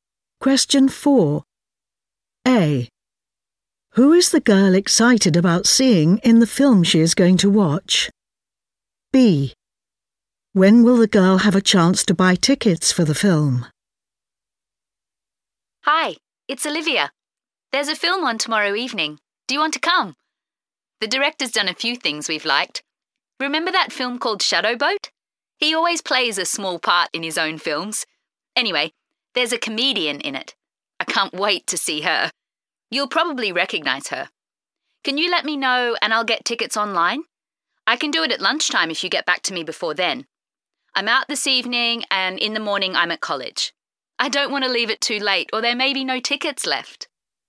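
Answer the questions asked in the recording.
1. a comedian
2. at lunchtime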